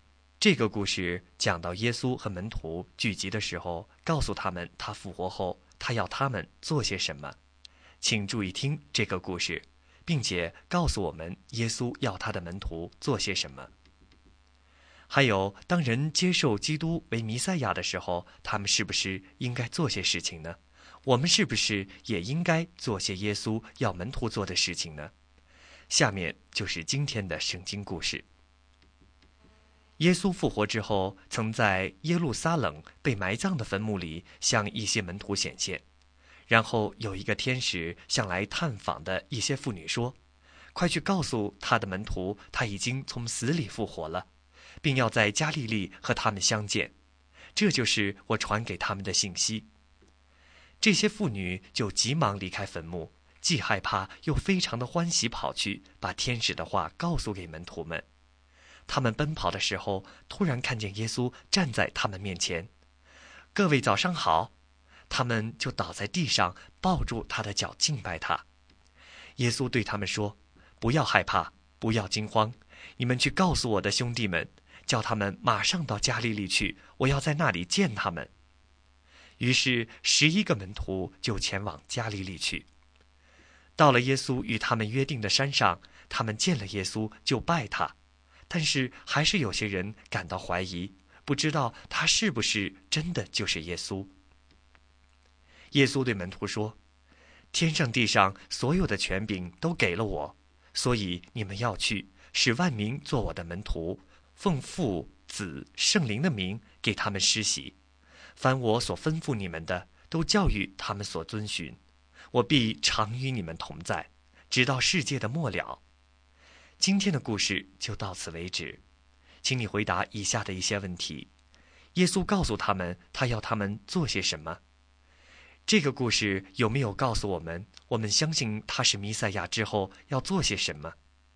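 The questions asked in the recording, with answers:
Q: 耶稣告诉他们他要他们做些什么?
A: 去使万民做他的门徒,奉父子圣灵的名给他们施洗,教导他们遵守他所吩咐的一切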